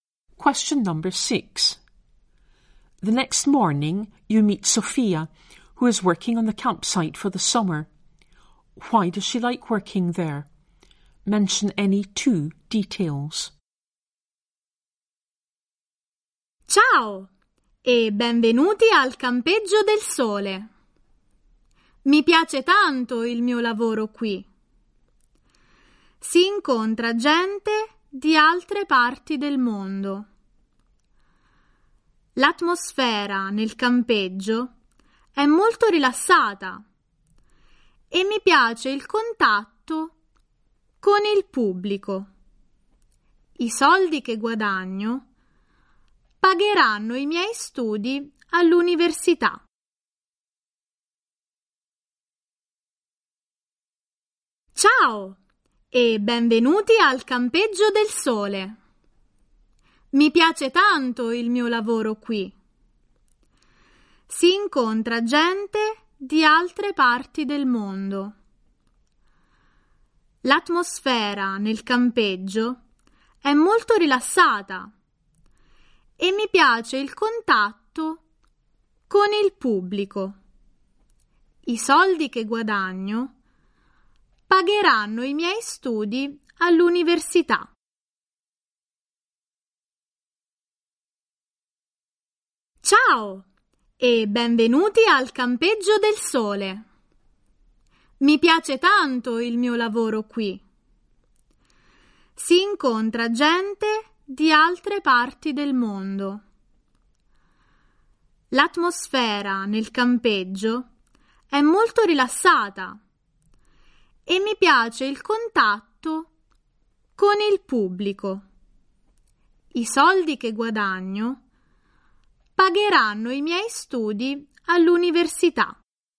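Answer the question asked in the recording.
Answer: Meets people from other parts of the world; relaxed atmosphere; likes contact with the public; money pays for university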